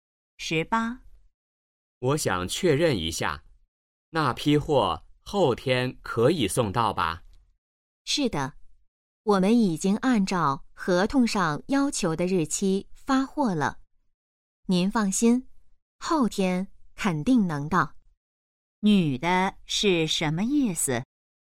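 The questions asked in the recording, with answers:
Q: 女的是什么意思?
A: 货后天肯定能到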